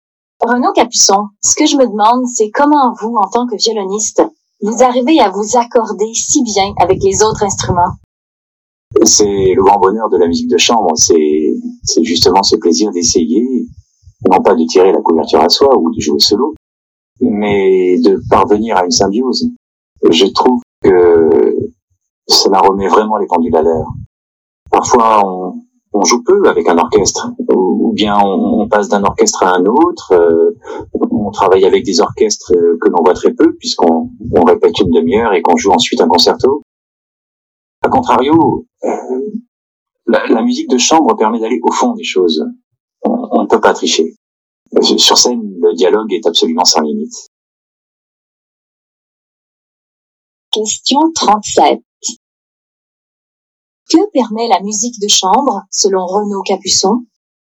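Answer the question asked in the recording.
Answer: D'aller au fond des choses, en parvenant à une symbiose avec les autres musiciens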